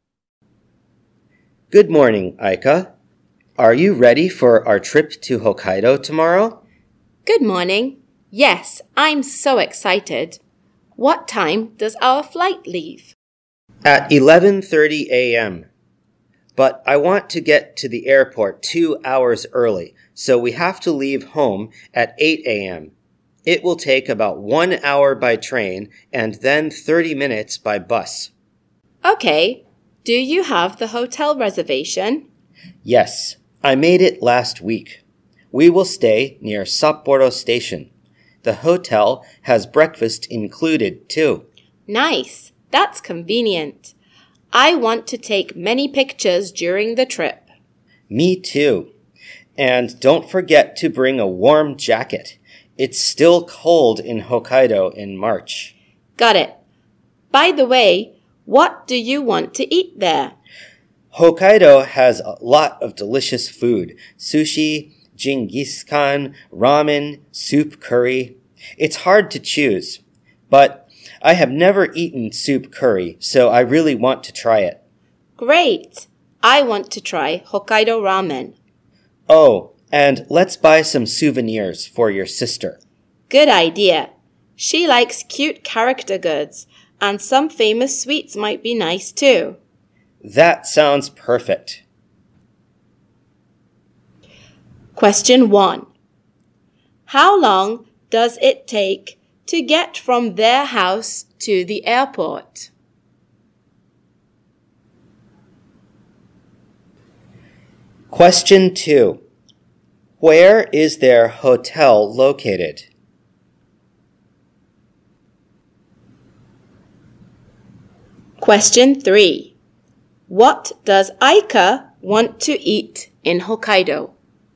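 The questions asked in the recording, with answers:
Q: How long does it take to get from their house to the airport?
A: About 1 hour and 30 minutes

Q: Where is their hotel located?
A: Near Sapporo Station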